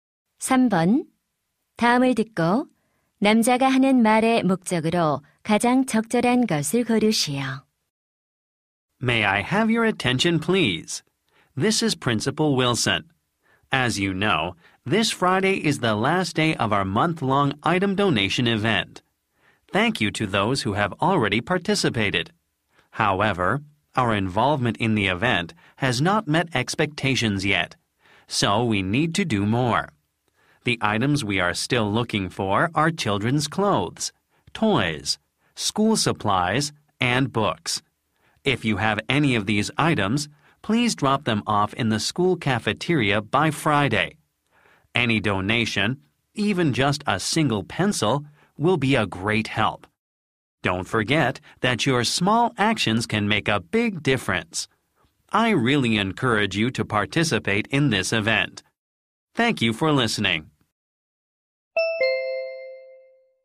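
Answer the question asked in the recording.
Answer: 물품 기부 행사 참여를 독려하려고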